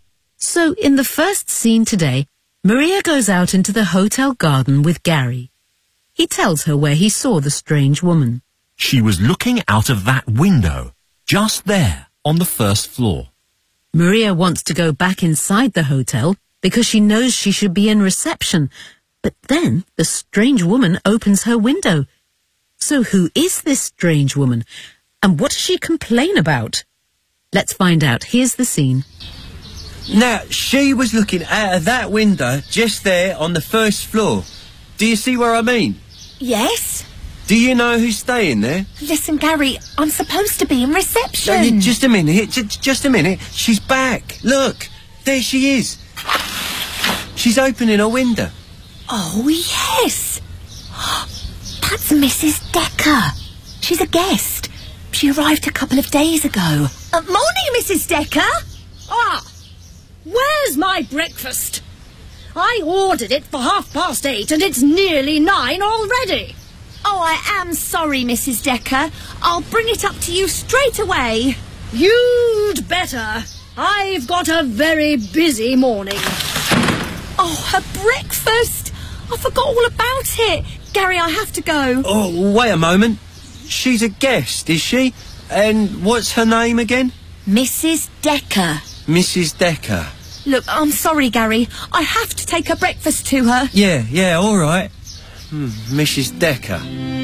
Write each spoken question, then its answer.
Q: So, who is this strange woman?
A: That's Mrs. Decker. She's a guest.

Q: And what does she complain about?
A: Where is my breakfast?I ordered it for 8:30, and it's nearly 9 already.